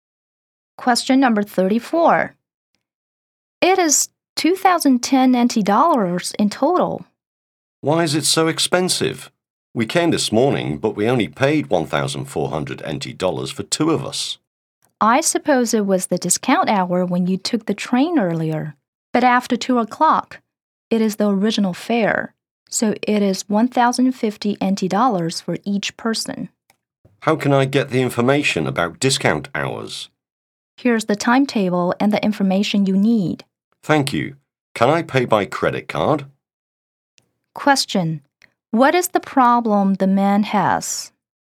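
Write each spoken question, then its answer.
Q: Question: What is the problem the man has?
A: The train fare is higher than he expected because it is no longer the discount hour.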